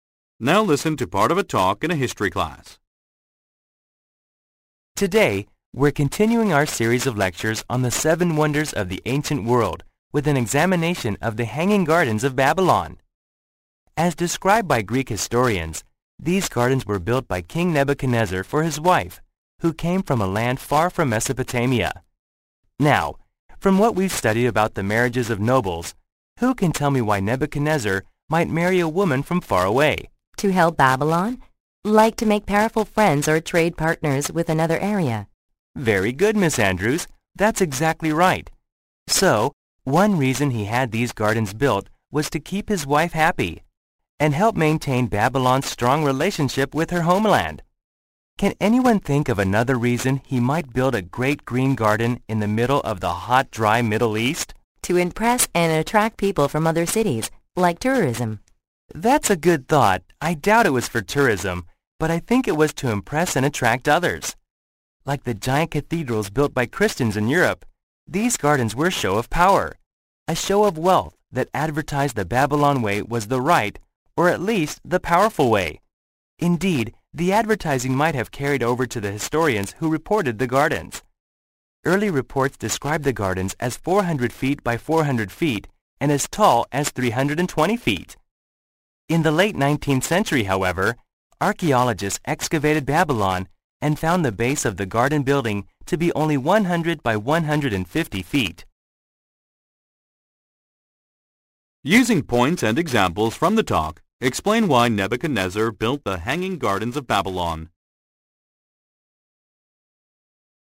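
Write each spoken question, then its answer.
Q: Using points and examples from the talk, explain why Nebuchadnezzar built the Hanging Gardens of Babylon.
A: To keep his foreign wife happy and keep strong ties with her homeland, and to show Babylon's power and wealth to impress and attract others.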